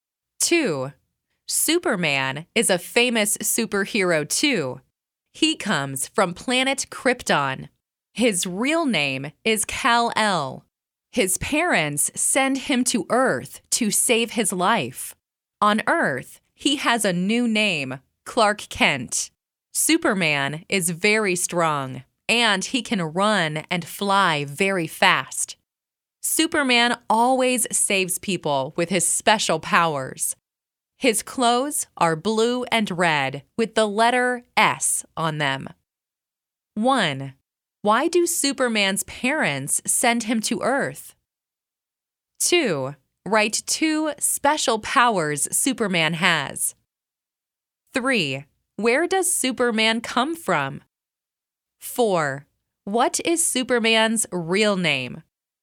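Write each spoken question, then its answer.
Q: Why do Superman's parents send him to Earth?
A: To save his life

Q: Write two special powers Superman has.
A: He is very strong and can run and fly very fast

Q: Where does Superman come from?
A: Planet Krypton

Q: What is Superman's real name?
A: Kal-El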